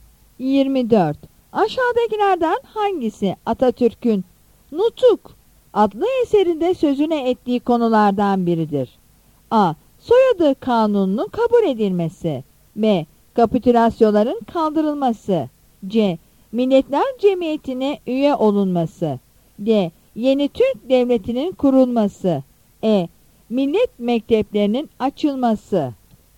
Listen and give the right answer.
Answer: Yanıt D'dir.